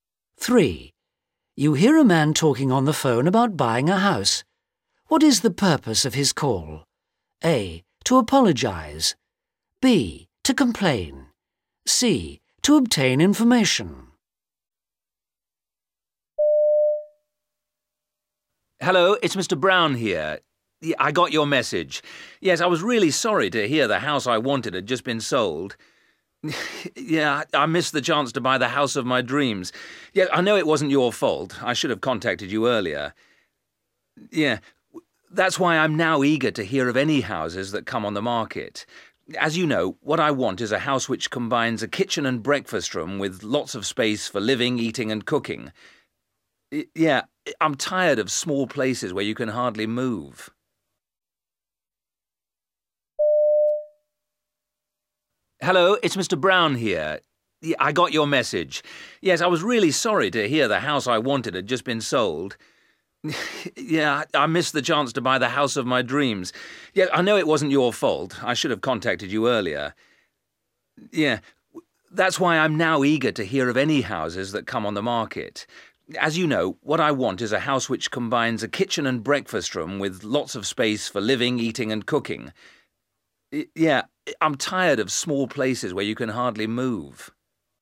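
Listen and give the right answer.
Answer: C: To obtain information.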